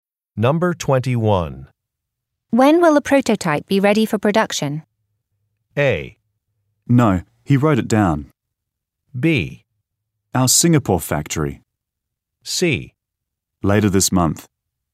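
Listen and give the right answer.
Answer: C: Later this month.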